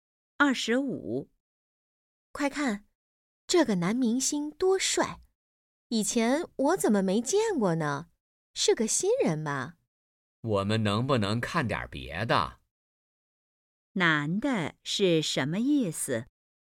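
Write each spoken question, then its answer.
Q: 男的是什么意思?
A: 他不想看这个节目,想看点别的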